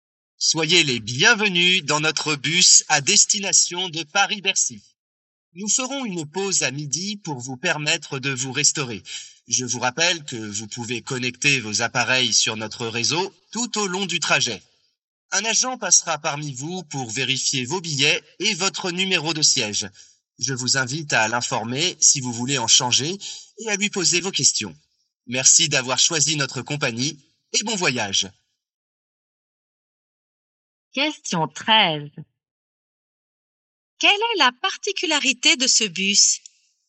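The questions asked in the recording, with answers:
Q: Quelle est la particularité de ce bus?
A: On peut se connecter au réseau pendant le trajet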